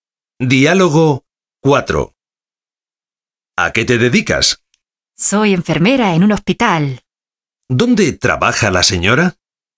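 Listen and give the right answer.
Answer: En un hospital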